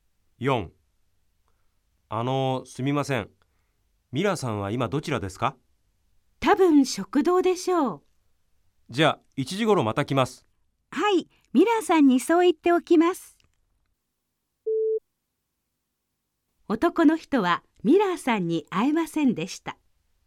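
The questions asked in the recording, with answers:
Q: 男の人はミラーさんに会えませんでした。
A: ○(正しい)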